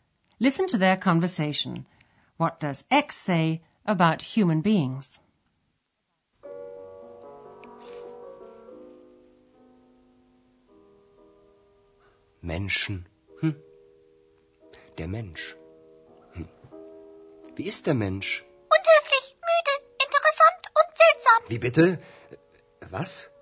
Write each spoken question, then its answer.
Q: What does Ex say about human beings?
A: Ex lists all their possible qualities, from impolite to strange.